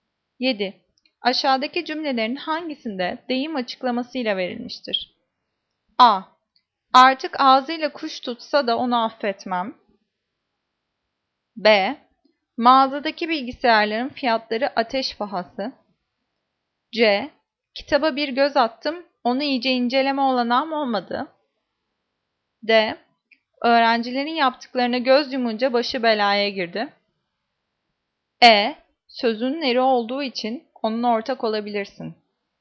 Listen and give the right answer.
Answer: Cevap C. Kitaba bir göz attım, onu iyice inceleme olanağım olmadı.